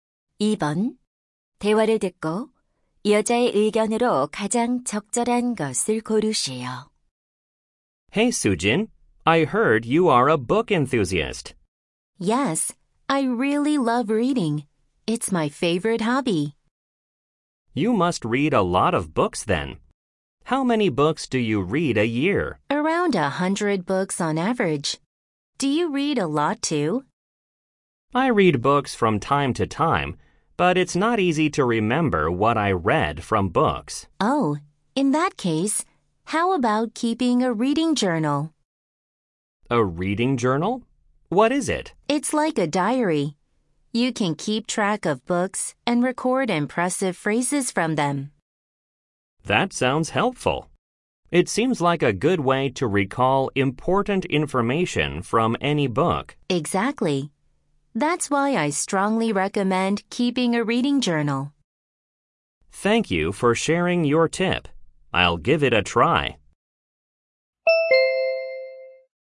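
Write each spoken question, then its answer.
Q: 대화를 듣고 여자의 의견으로 가장 적절한 것을 고르시오.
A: 독서 일지를 쓰는 것이 책 내용을 기억하는 데 도움이 된다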